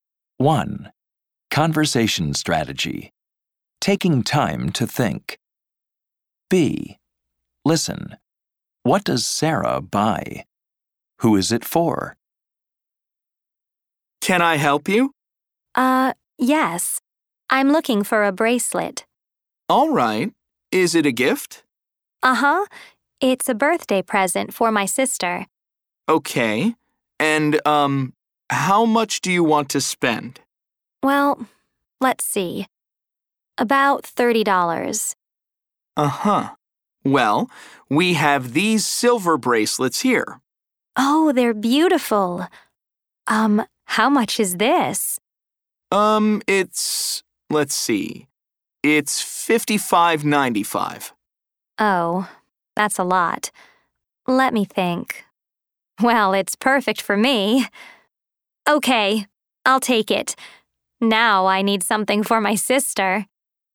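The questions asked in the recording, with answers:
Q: What does Sarah buy?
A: A silver bracelet

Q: Who is it for?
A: Herself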